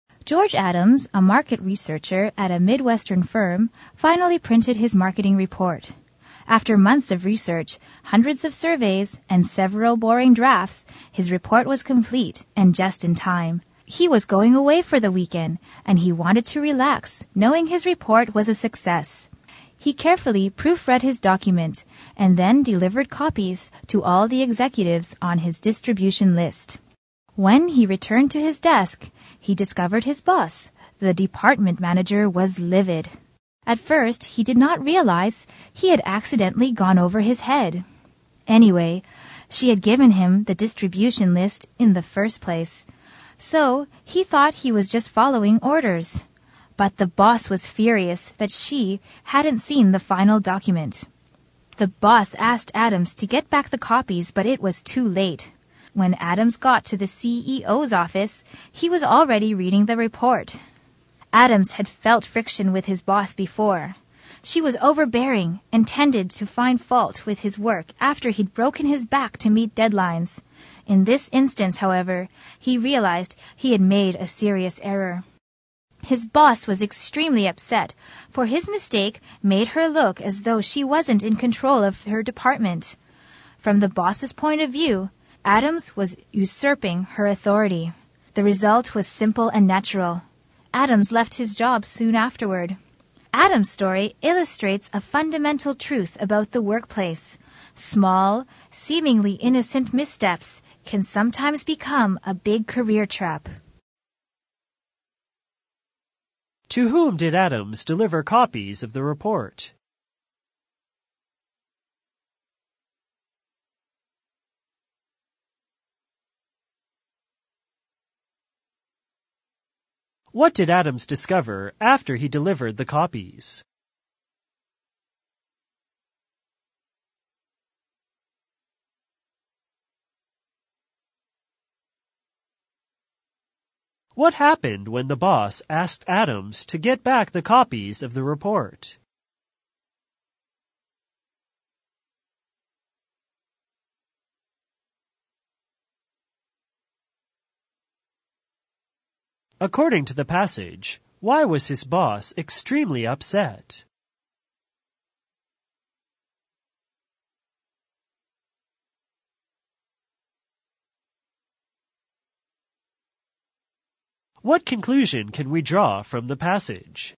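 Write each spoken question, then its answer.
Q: To whom did Adams deliver copies of the report?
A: All the executives on his distribution list

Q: What did Adams discover after he delivered the copies?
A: His boss, the department manager, was livid

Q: What happened when the boss asked Adams to get back the copies of the report?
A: It was too late; the CEO was already reading the report

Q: According to the passage, why was his boss extremely upset?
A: His mistake made her look as though she wasn't in control of her department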